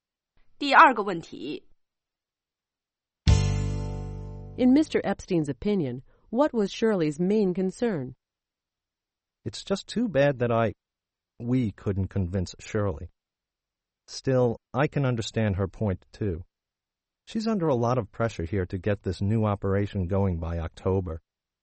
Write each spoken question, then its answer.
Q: In Mr. Epstein's opinion, what was Shirley's main concern?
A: He felt that her main concern was the October deadline.